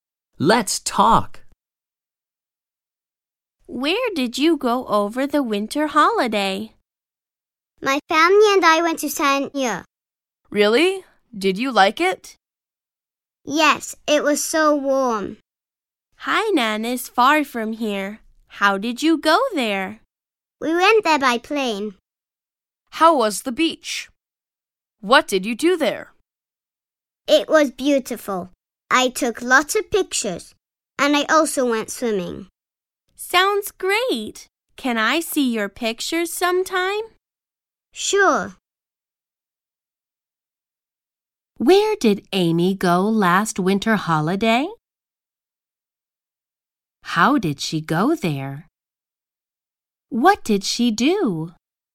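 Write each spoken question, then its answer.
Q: Where did Amy go last winter holiday?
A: Sanya

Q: How did she go there? What did she do?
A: By plane; she took lots of pictures and went swimming.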